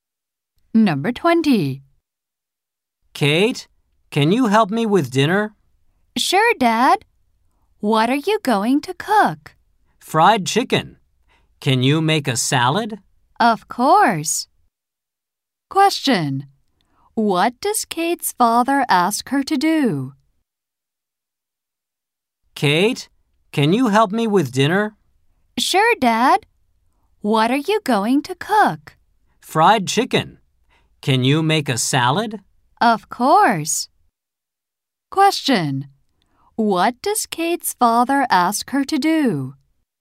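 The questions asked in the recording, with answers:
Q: What does Kate's father ask her to do?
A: Make a salad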